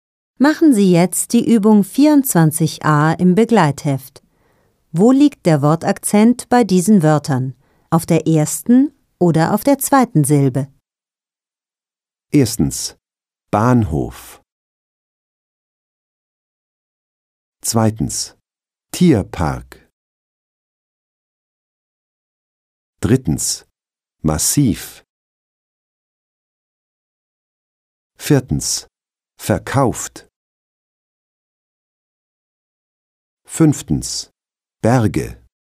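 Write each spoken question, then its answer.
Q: Erstens, Bahnhof.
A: Auf der ersten Silbe

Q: Zweitens, Tierpark.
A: Auf der ersten Silbe

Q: Drittens, Massiv.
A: Auf der zweiten Silbe

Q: Viertens, verkauft.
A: Auf der zweiten Silbe

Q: Fünftens, Berge.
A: Auf der ersten Silbe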